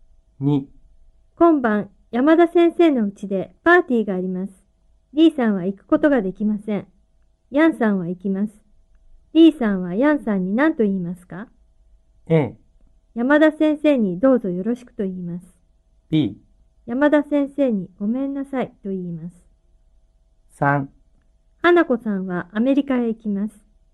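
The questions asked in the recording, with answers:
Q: D さんはヤンさんに何と言いますか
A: A: 山田先生にどうぞよろしくと言います。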